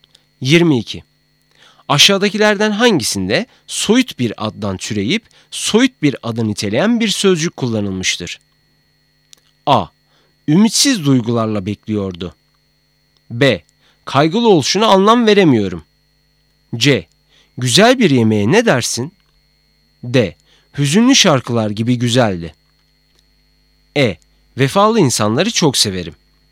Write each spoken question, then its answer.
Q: Aşağıdakilerden hangisinde soyut bir addan türeyip soyut bir adı niteleyen bir sözcük kullanılmıştır?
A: Doğru cevap A.